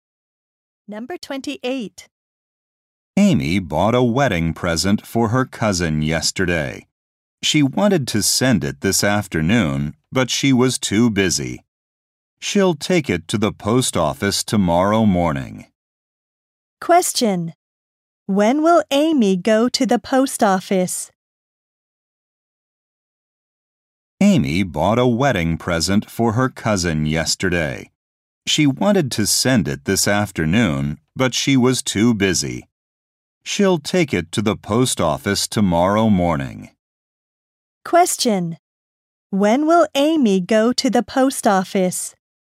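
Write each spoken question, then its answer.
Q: When will Amy go to the post office?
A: Tomorrow morning.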